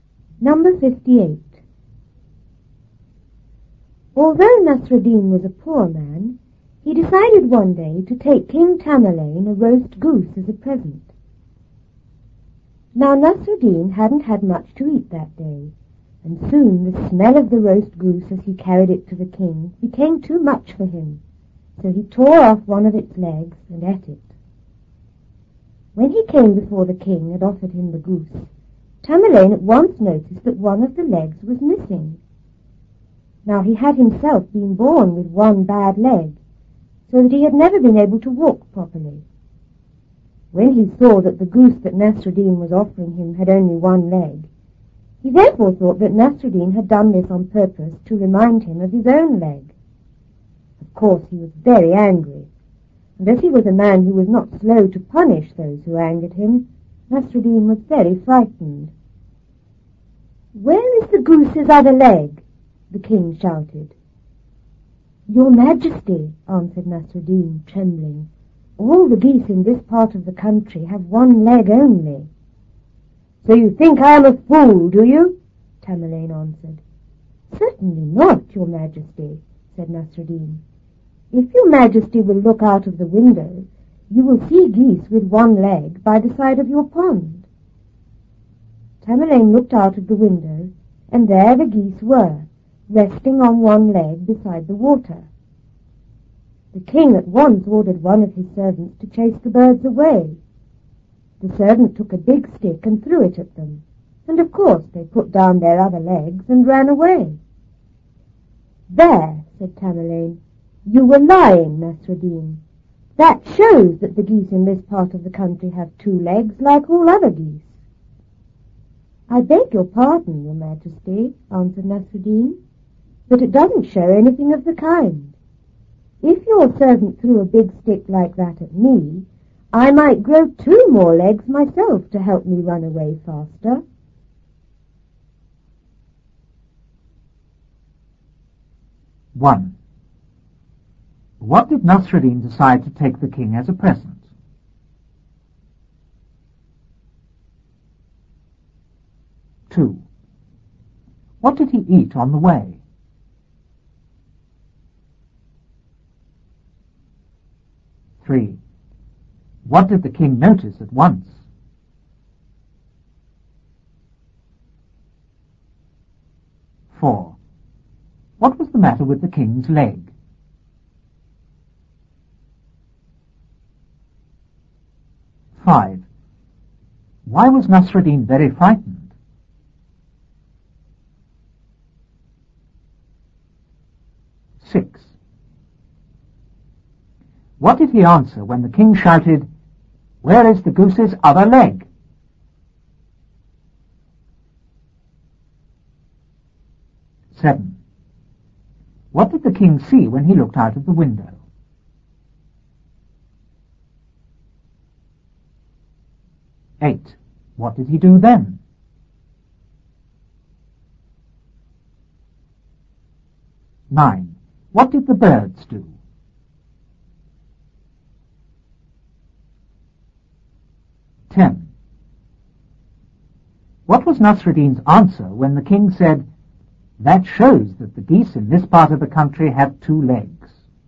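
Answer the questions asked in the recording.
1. A roast goose
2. One of the goose's legs
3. That one of the goose's legs was missing
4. He was born with one bad leg and could never walk properly
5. The king was very angry and quick to punish people who angered him
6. That all the geese in this part of the country have only one leg
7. Geese resting on one leg beside the pond
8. He ordered a servant to chase the birds away
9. They put down their other legs and ran away
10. That it showed nothing of the kind: if someone threw a big stick at him, he might grow two more legs to run away faster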